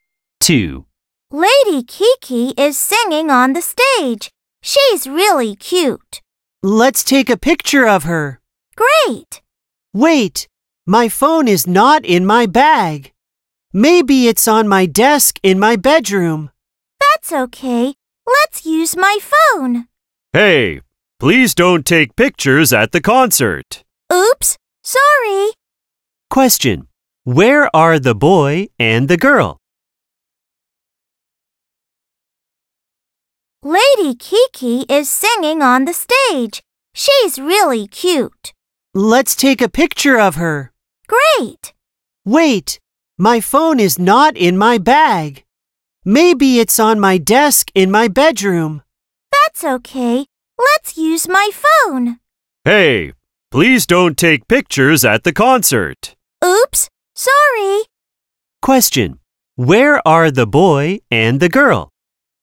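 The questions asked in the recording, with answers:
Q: Where are the boy and the girl?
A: At a concert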